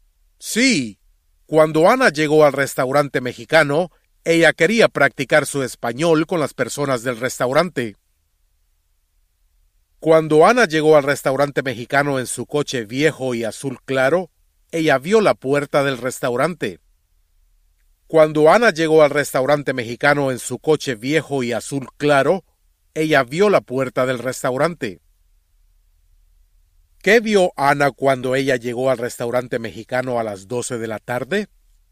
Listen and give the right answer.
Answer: Ella vio la puerta del restaurante.